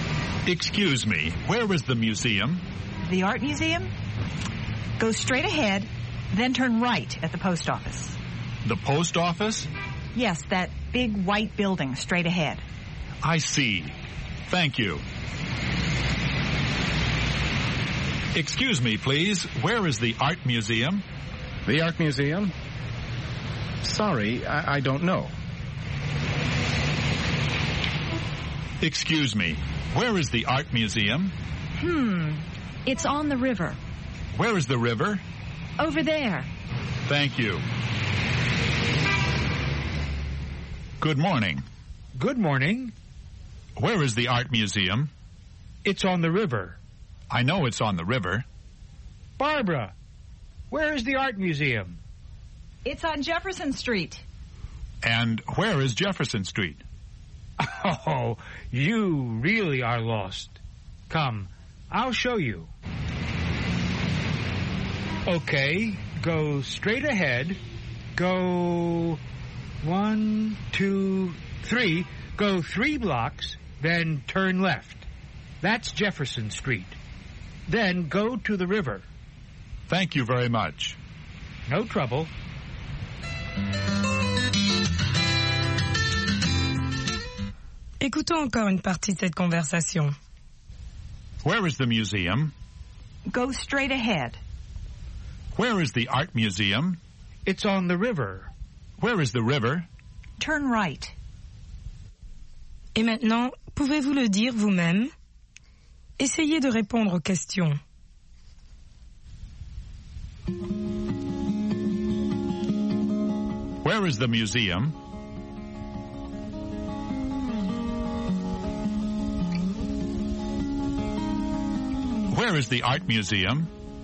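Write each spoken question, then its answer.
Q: Where is the museum?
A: Go straight ahead, then turn right at the post office.

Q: Where is the art museum?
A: It's on the river.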